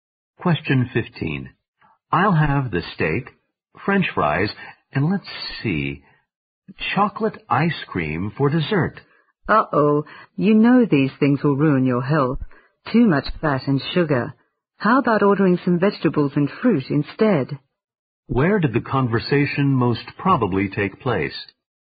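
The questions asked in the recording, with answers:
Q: Where did the conversation most probably take place?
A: In a restaurant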